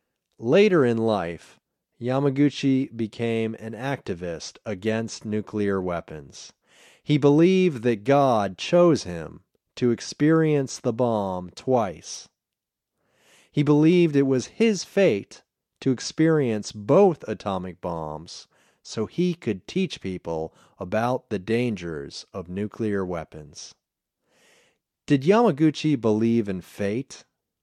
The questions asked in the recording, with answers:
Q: Did Yamaguchi believe in fate?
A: Yes, he believed in fate.